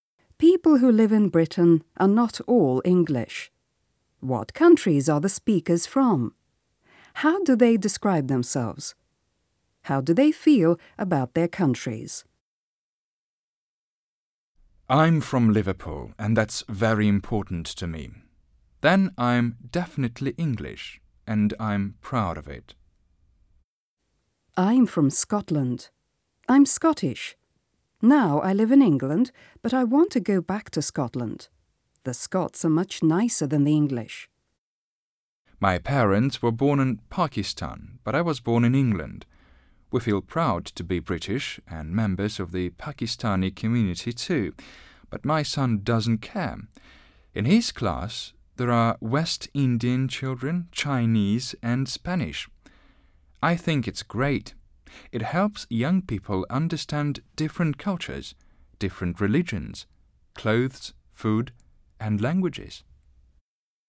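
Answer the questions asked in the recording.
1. The first speaker is from England (Liverpool), the second from Scotland, and the third was born in England to Pakistani parents.
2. English; Scottish; British and part of the Pakistani community
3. The first is proud to be English. The second wants to go back to Scotland and thinks the Scots are nicer. The third is proud to be British and Pakistani and thinks mixed cultures are great.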